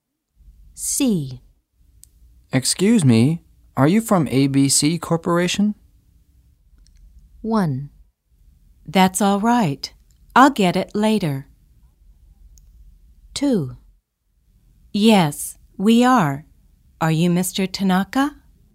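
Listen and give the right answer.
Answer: 2: Yes, we are. Are you Mr. Tanaka?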